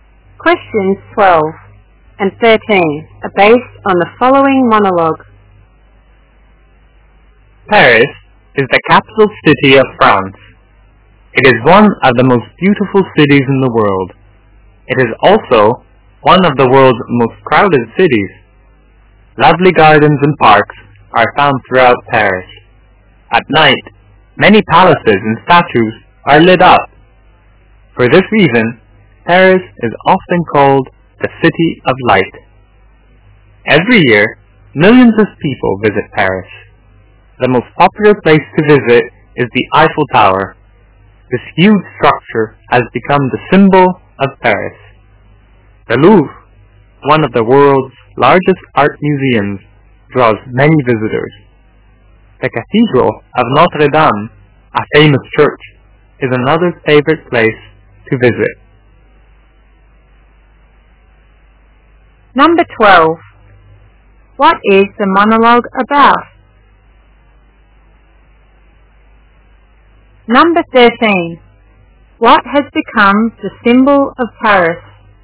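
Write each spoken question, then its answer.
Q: What is the monologue about?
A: Paris

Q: What has become the symbol of Paris?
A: The Eiffel Tower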